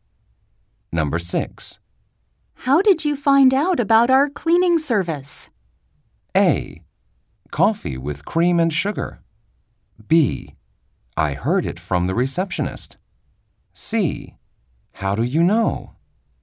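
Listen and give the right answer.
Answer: B: I heard it from the receptionist.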